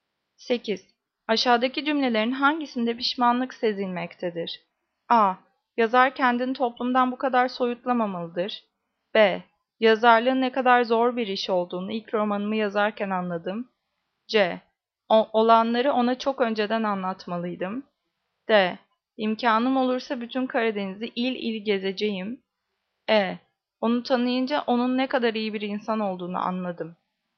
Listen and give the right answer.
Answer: Cevap C. Olanları ona çok önceden anlatmalıydım.